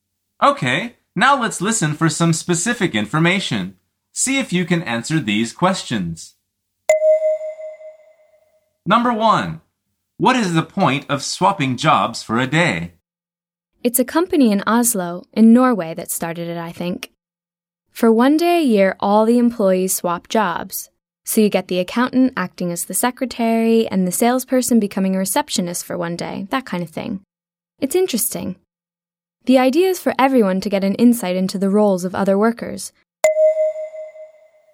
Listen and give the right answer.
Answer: The answer is to get some insight into other people's work and understand their problems.